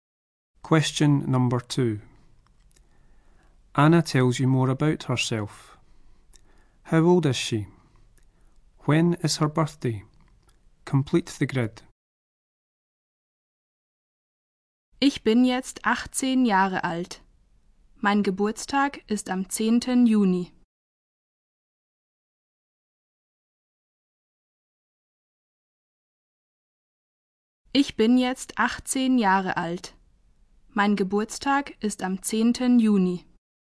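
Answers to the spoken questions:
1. 18
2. 10th June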